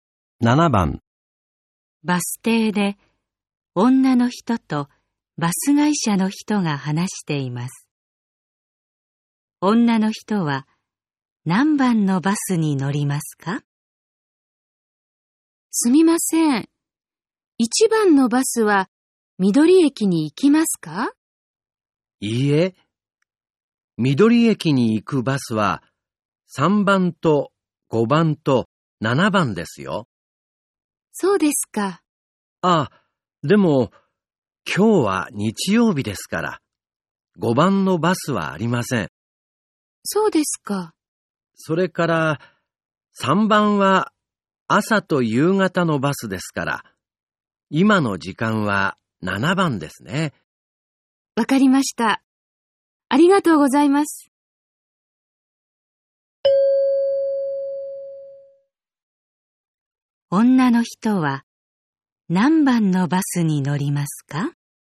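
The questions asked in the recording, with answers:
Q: 女の人は何番のバスに乗りますか?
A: 7番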